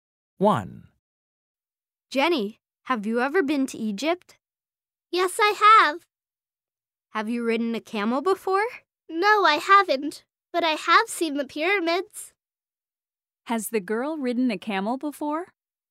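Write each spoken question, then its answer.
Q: Has the girl ridden a camel before?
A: No, she hasn't.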